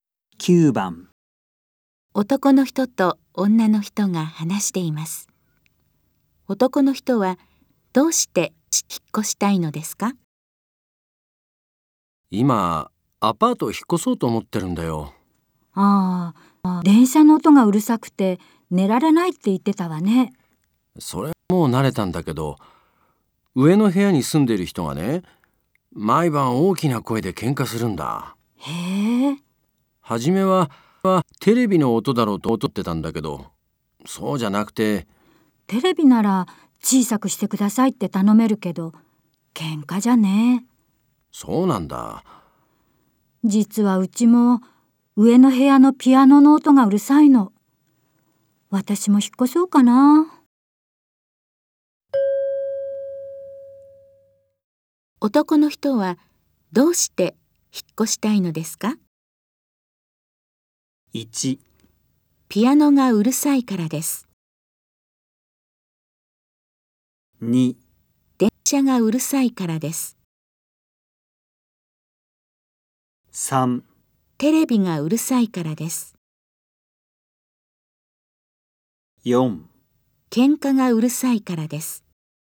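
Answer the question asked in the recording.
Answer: 4: 喧嘩がうるさいからです。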